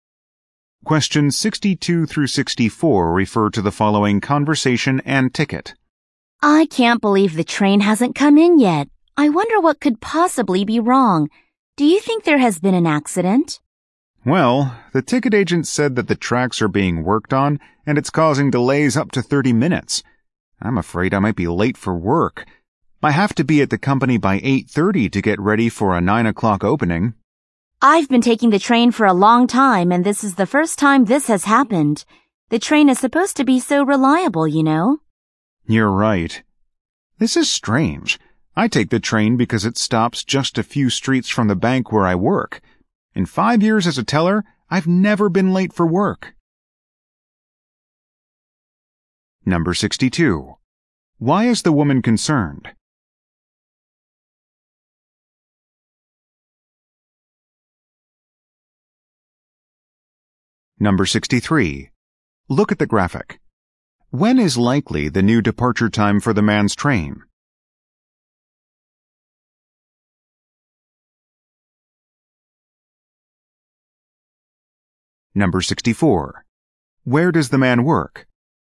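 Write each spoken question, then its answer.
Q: Why is the woman concerned?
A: She might be late for work

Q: Where does the man work?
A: At a bank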